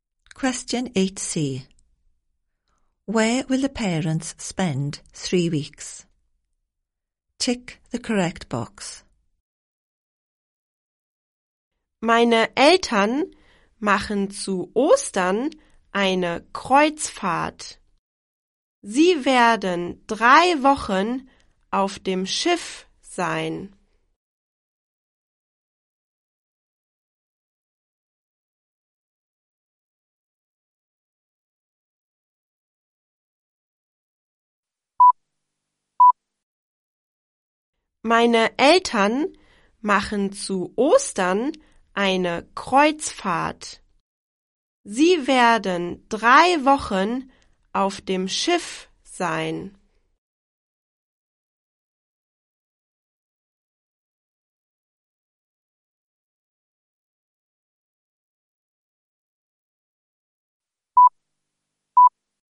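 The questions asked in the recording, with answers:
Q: Where will the parents spend 3 weeks?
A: On a ship (a cruise)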